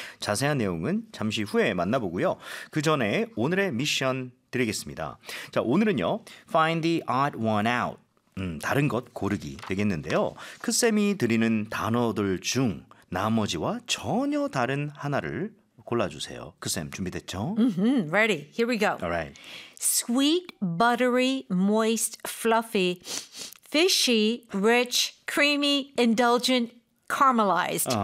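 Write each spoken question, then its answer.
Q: Find the odd one out.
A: Fishy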